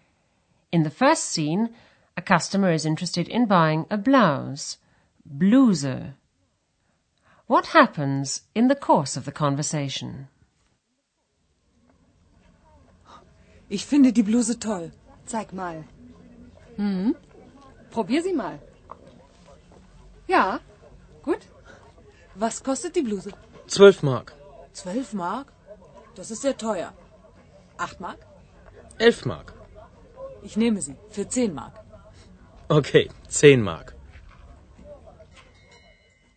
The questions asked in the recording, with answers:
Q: What happens in the course of the conversation?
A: The customer strikes a compromise and says she'll take it for 10 marks.